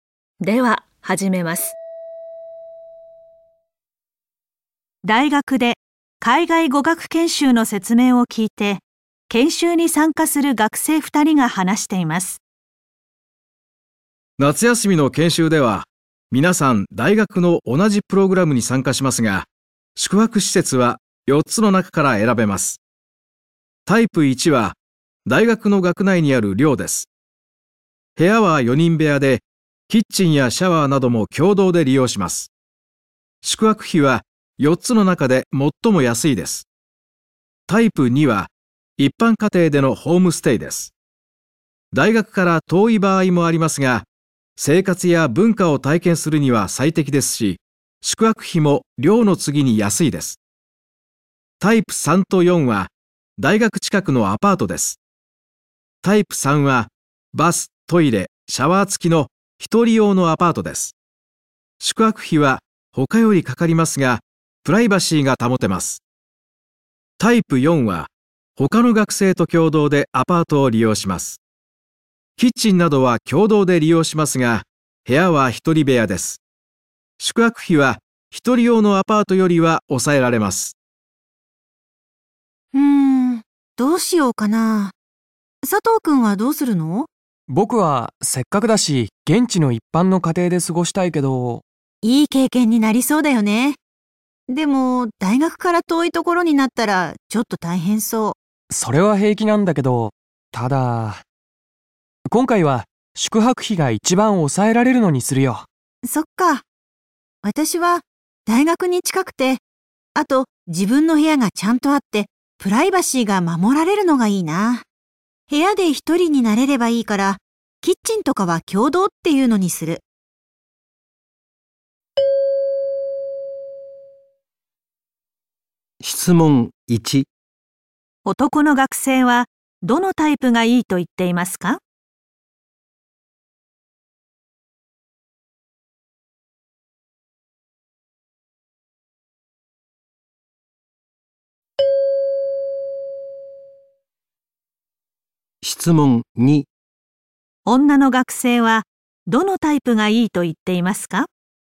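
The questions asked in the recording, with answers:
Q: 男の学生はどのタイプがいいと言っていますか?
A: タイプ1(大学の寮)

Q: 女の学生はどのタイプがいいと言っていますか?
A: タイプ4(共同アパートの一人部屋)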